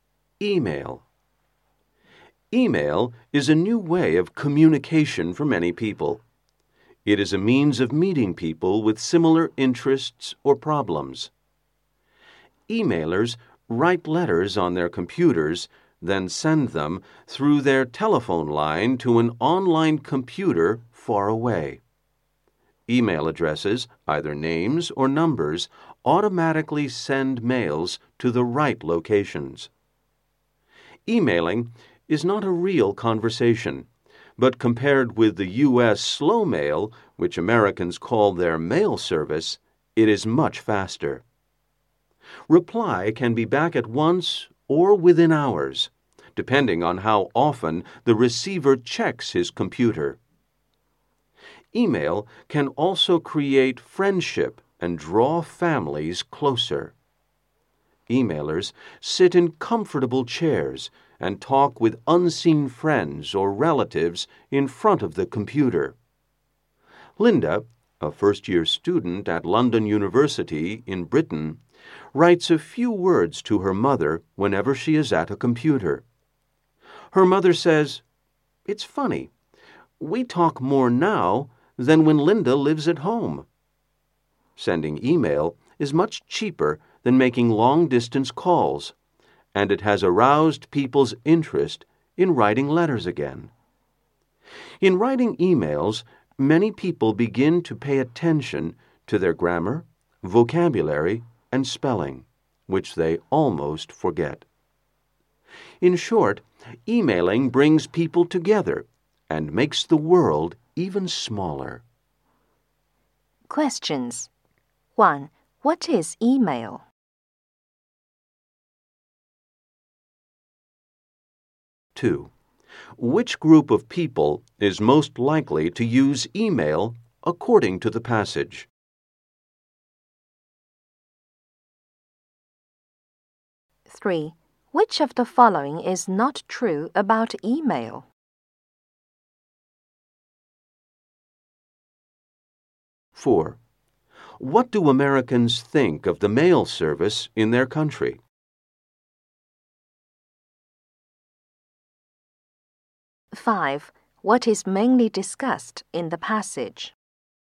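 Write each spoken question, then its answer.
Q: What is email?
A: A new way of communication

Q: What do Americans think of the mail service in their country?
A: It is slow (they call it slow mail)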